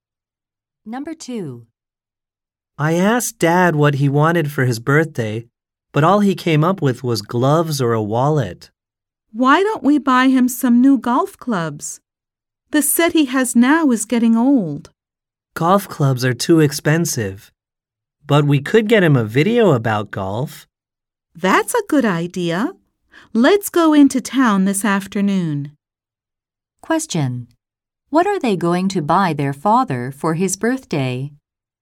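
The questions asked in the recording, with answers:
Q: What are they going to buy their father for his birthday?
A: A video about golf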